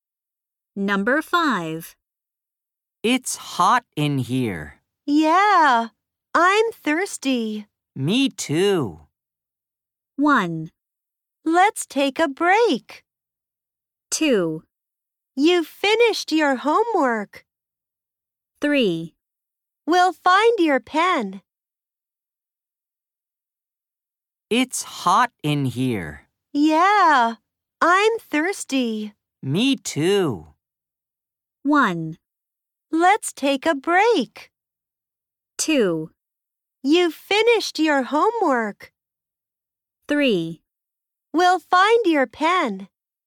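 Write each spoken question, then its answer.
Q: Me too.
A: 1: Let's take a break.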